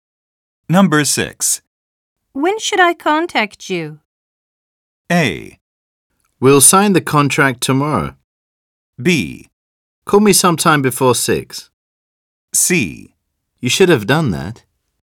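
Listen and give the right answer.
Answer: B: Call me sometime before 6.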